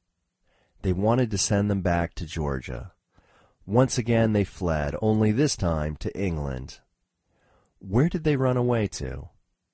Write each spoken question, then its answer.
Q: Where did they run away to?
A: They ran away to England.